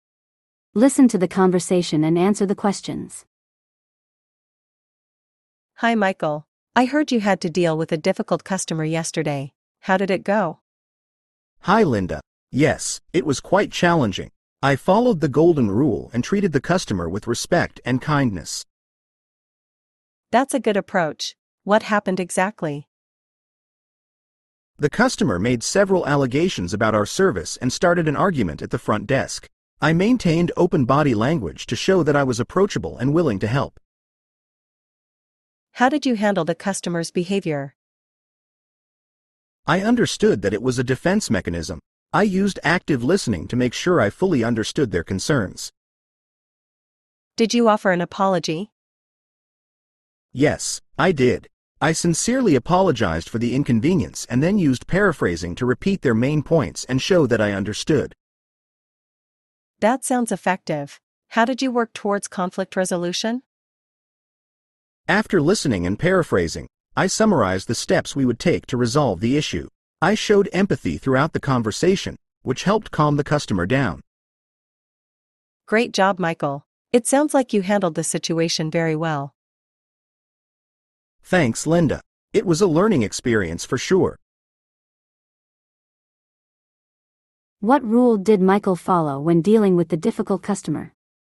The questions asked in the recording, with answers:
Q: What rule did Michael follow when dealing with the difficult customer?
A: Golden rule.